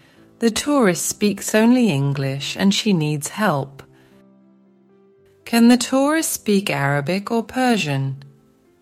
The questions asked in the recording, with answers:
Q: Can the tourist speak Arabic or Persian?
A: No, she can't. She only speaks English.